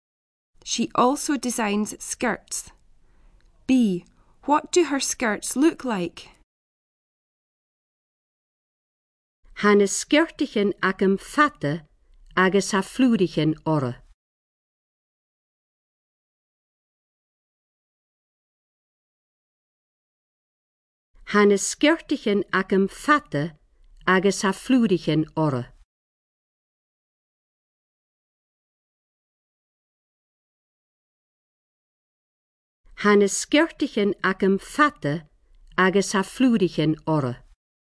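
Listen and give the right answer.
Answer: Long, with flowers on them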